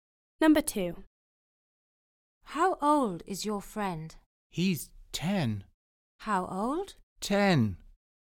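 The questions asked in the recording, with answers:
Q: How old is your friend?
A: 10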